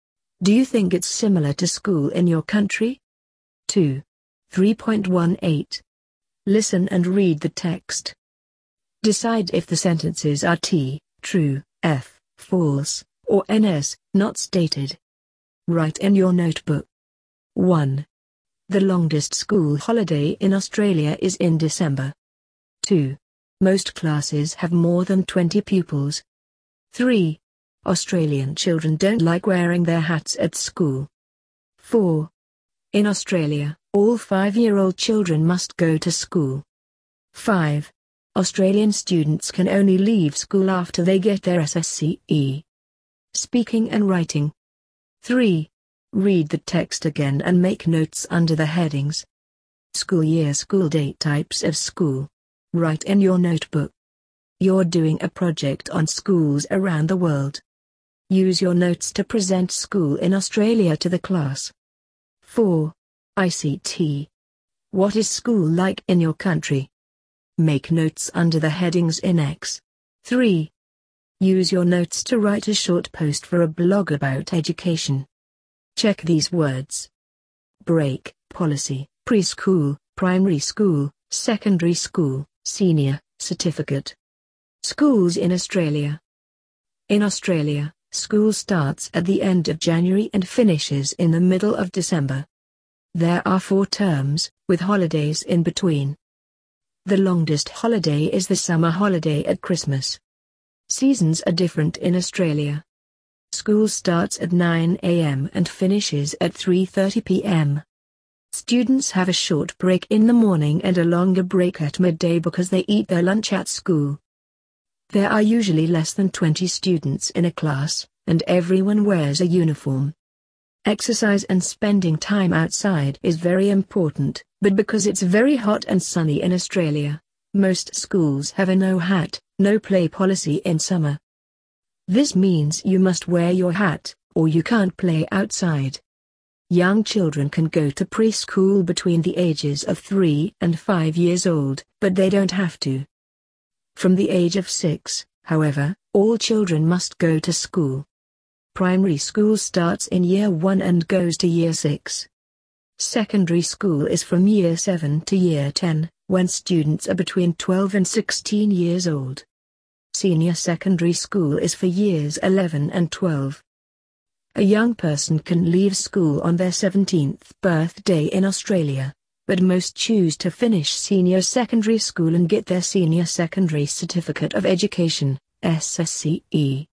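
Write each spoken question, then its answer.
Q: The longest school holiday in Australia is in December.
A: T (true)

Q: Most classes have more than 20 pupils.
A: F (false)

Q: Australian children don't like wearing their hats at school.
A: NS (not stated)

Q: In Australia, all 5-year-old children must go to school.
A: F (false)

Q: Australian students can only leave school after they get their SSCE.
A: F (false)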